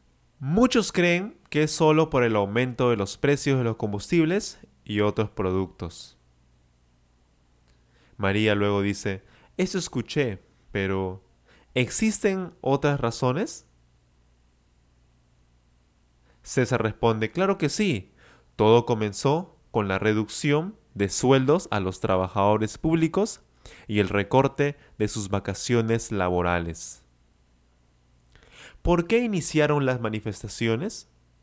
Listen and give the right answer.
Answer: Las manifestaciones iniciaron por la reducción de sueldo, es decir, la disminución de sueldos a los trabajadores públicos